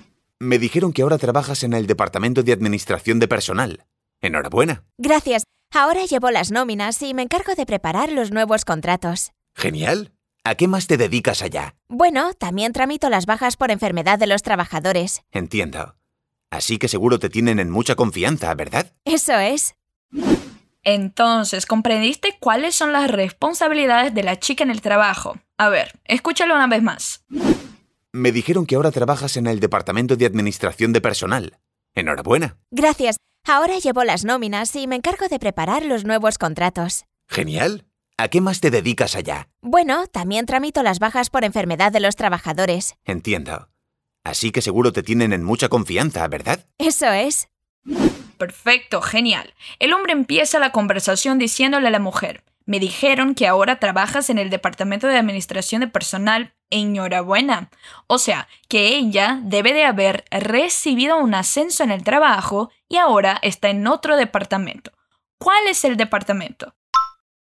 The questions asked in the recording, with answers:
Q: ¿Cuál es el departamento?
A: Administración de Personal.